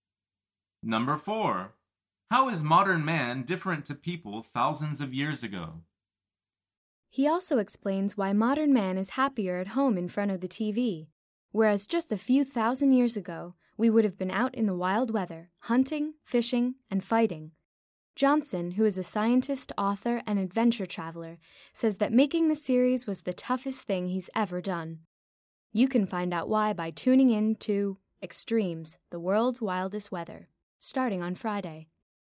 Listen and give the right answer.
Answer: The answer is modern man prefers to stay inside at home rather than be out in the wild weather hunting, fishing, and fighting.